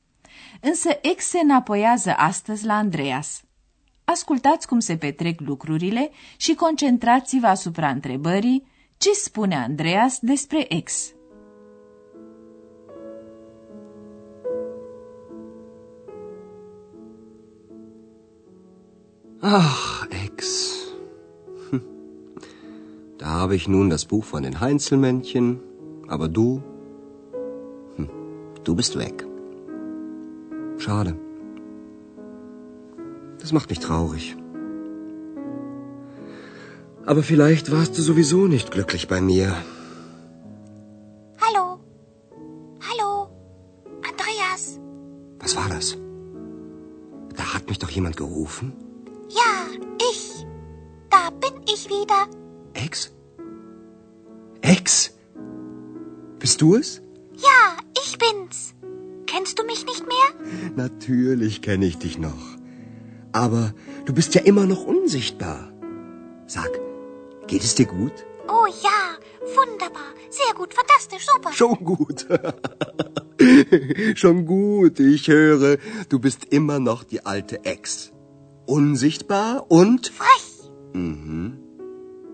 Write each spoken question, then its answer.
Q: ce spune Andreas despre ex.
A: Andreas constată că ex a rămas tot cea dinainte.